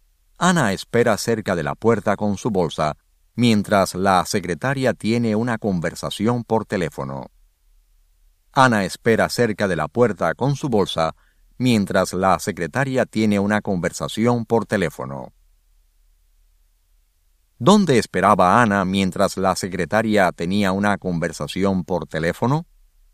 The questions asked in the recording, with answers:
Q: ¿Dónde esperaba Ana mientras la secretaria tenía una conversación por teléfono?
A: Ana esperaba cerca de la puerta con su bolsa, mientras la secretaria tenía una conversación por teléfono.